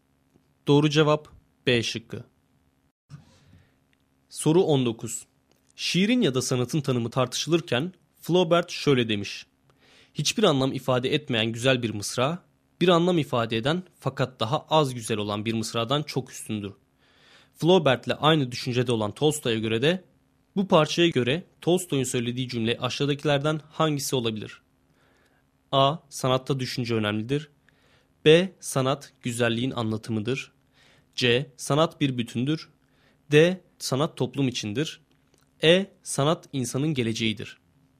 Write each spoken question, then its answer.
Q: Flaubert'le aynı düşüncede olan Tolstoy'a göre de bu parçaya göre Tolstoy'un söylediği cümle aşağıdakilerden hangisi olabilir?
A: Doğru cevap B şıkkı.